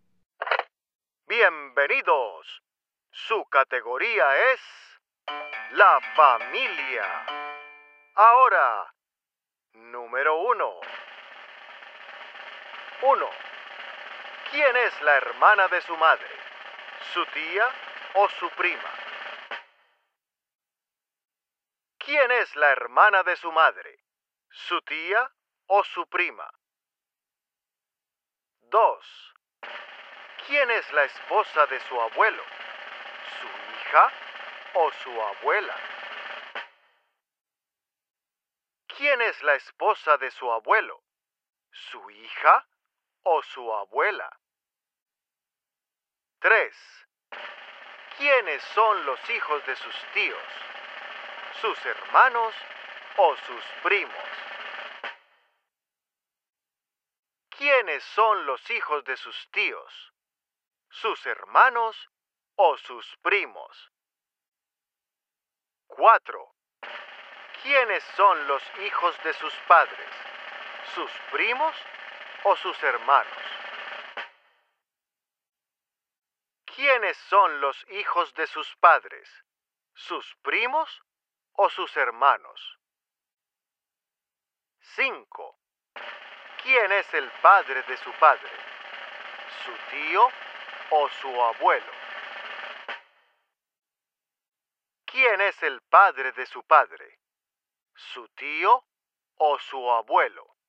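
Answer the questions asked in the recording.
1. Su tía
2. Su abuela
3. Sus primos
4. Sus hermanos
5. Su abuelo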